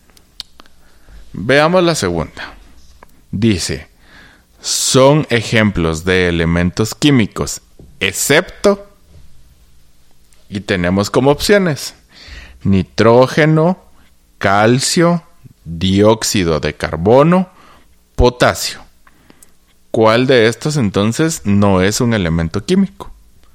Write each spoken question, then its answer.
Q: ¿Cuál de estos entonces no es un elemento químico?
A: Muy bien, ajá, es la tercera opción.